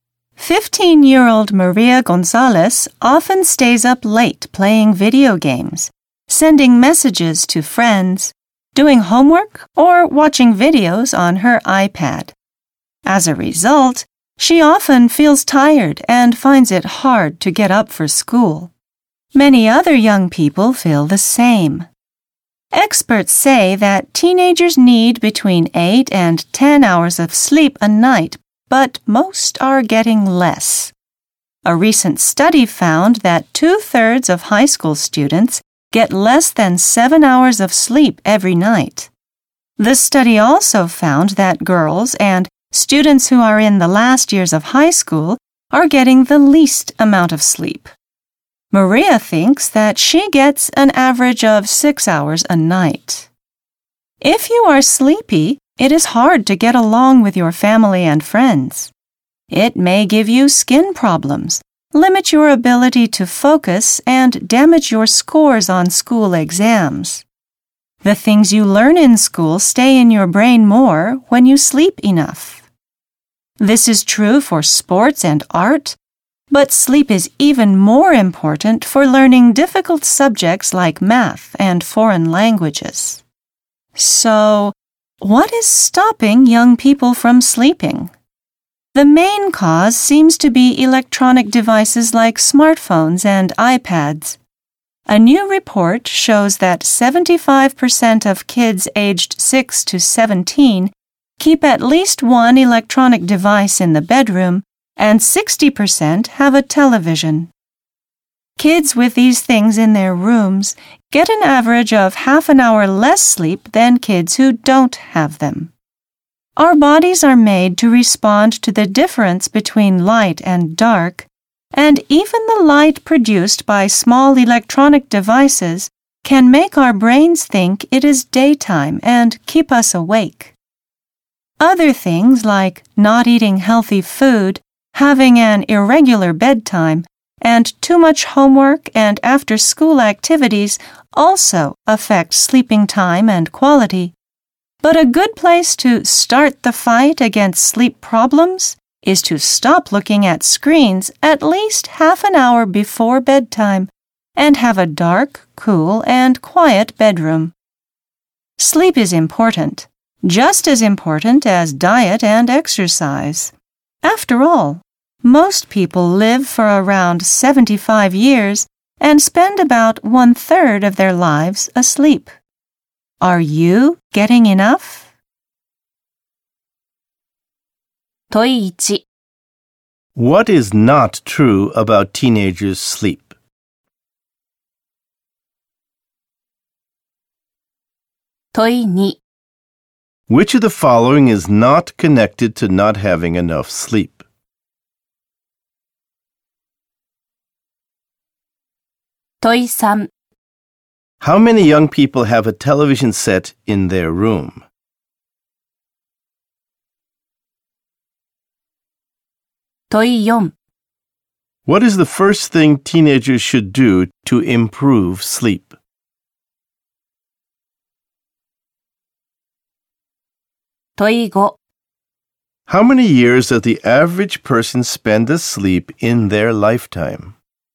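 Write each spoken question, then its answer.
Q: How many young people have a television set in their room?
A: 60% (of kids aged 6 to 17)

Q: What is the first thing teenagers should do to improve sleep?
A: Stop looking at screens at least half an hour before bedtime

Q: How many years does the average person spend asleep in their lifetime?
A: About 25 years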